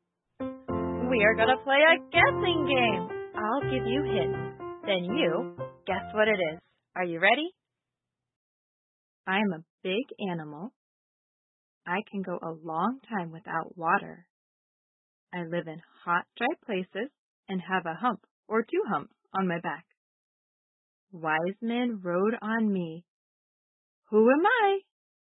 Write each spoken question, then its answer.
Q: Who am I?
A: Camel.